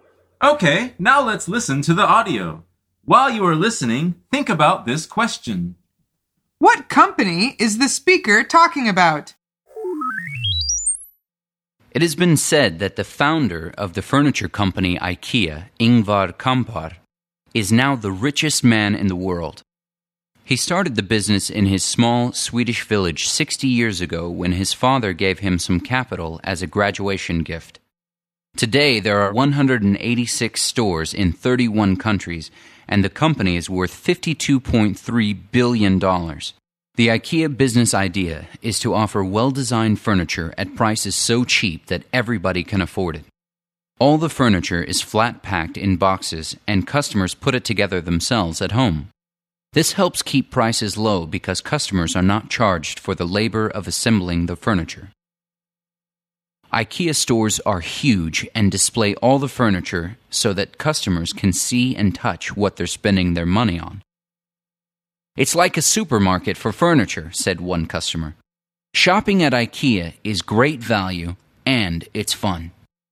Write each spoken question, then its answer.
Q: What company is the speaker talking about?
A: he is talking about IKEA.